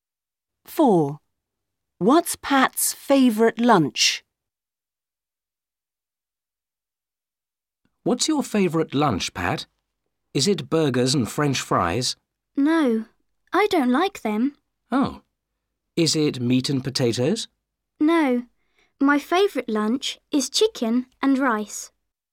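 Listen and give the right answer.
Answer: Chicken and rice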